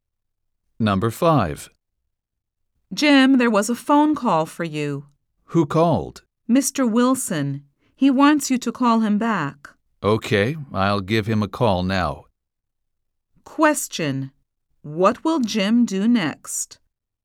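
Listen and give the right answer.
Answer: Call Mr. Wilson back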